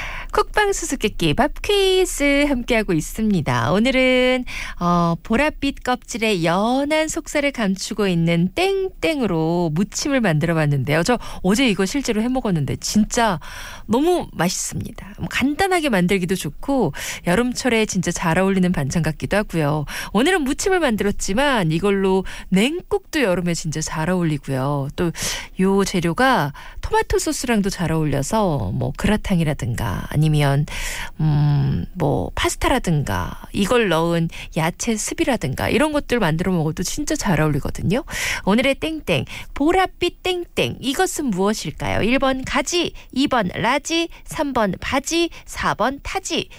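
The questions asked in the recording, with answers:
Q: 오늘의 땡땡 보랏빛 땡땡 이것은 무엇일까요? 1번 가지, 2번 라지, 3번 바지, 4번 타지.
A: 1: 가지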